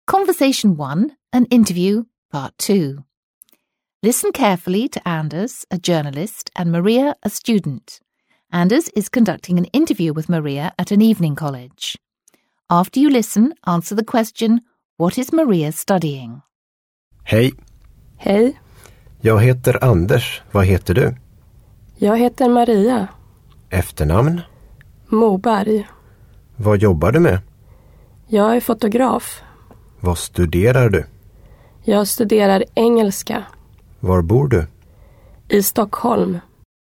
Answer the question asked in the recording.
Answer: That's right, she's studying English.